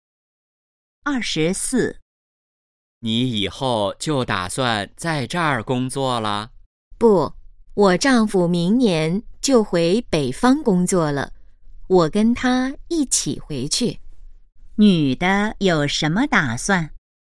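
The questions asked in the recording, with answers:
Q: 女的有什么打算?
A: 明年跟丈夫一起回北方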